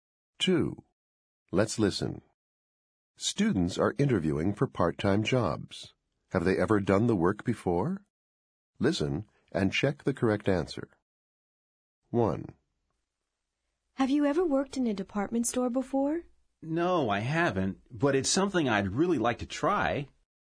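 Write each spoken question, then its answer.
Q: Have they ever done the work before?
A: No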